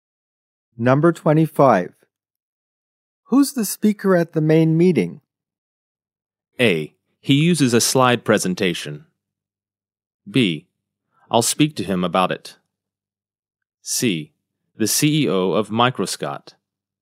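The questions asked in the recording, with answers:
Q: Who's the speaker at the main meeting?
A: C: The CEO of Microscott.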